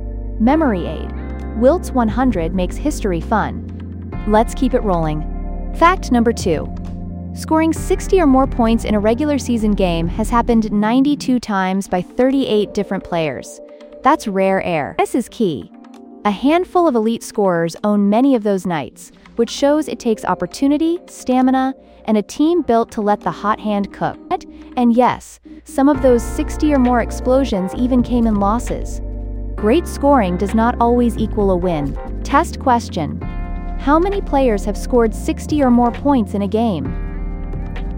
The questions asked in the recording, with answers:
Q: How many players have scored 60 or more points in a game?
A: Correct answer, 38.